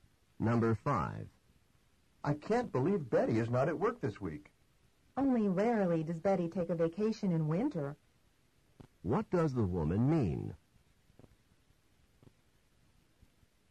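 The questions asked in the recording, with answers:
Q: What does the woman mean?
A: Betty seldom takes a winter vacation.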